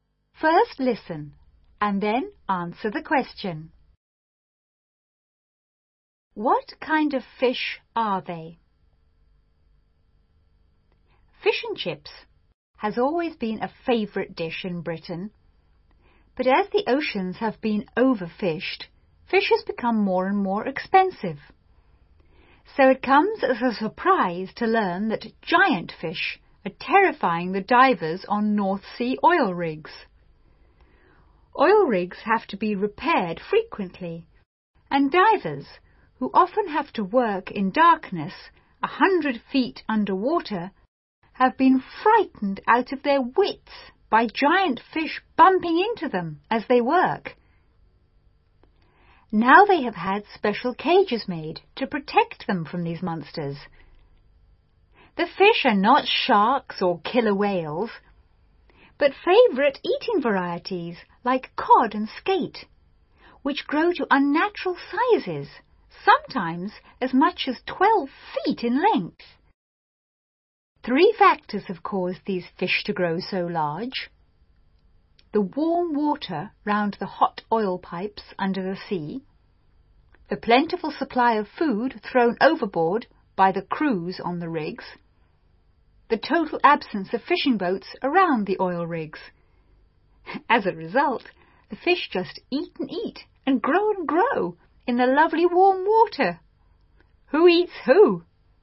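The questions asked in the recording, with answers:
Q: What kind of fish are they?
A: Favourite eating varieties like cod and skate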